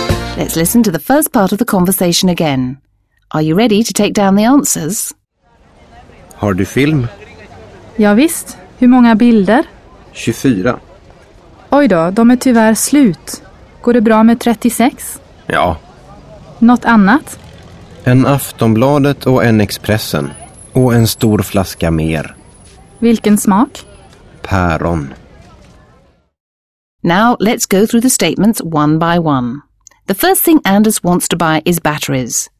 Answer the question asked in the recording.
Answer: False. The first thing Anders wants to buy is film for his camera.